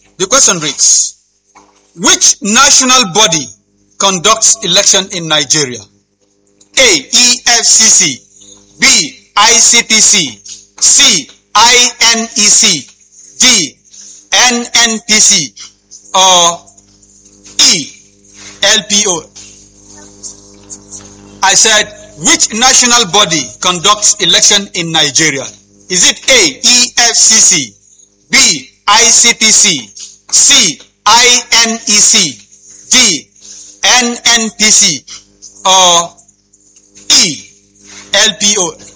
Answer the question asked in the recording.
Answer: And INEC. Round of applause for that.